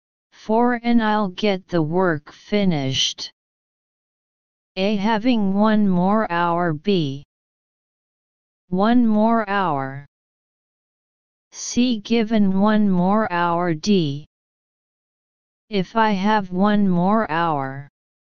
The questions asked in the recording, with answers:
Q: And I'll get the work finished.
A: Answer B.